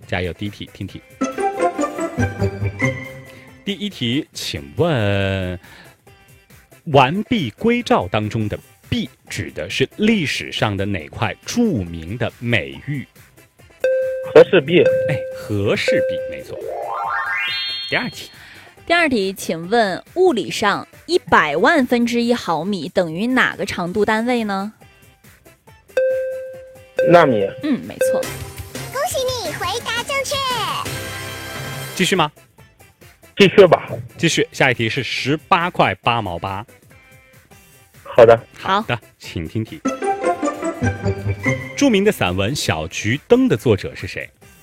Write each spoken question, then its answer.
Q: 请问《完璧归赵》当中的璧指的是历史上的哪块著名的美玉?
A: 哎,和氏璧,没错。

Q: 请问物理上100万分之1毫米等于哪个长度单位呢?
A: 没错。